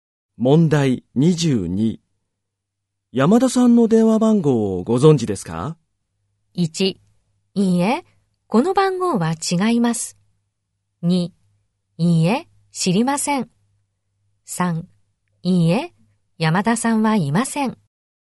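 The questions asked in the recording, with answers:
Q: 山田さんの電話番号をご存知ですか?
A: 3: いいえ、知りません。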